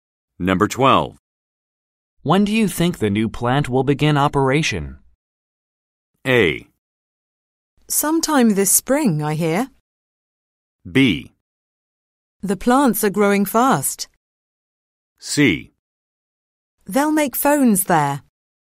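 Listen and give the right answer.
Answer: A: Sometime this spring, I hear.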